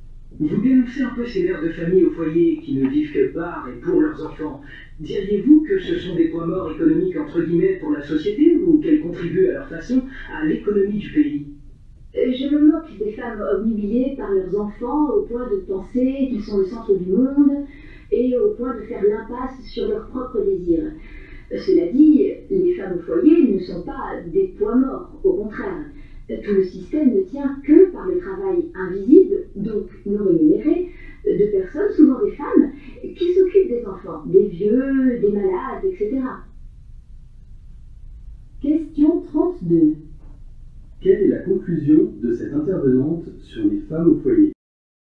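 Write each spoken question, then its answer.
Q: Quelle est la conclusion de cette intervenante sur les femmes au foyer ?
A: Elles ne sont pas des points morts : elles contribuent à l'économie par leur travail invisible et non rémunéré (soin des enfants, des vieux, des malades).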